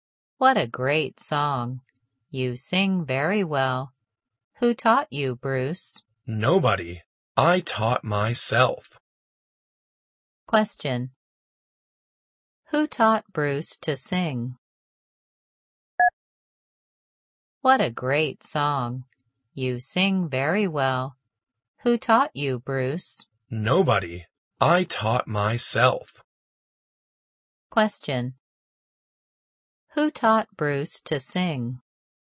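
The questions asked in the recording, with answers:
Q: Who taught Bruce to sing?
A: Nobody; he taught himself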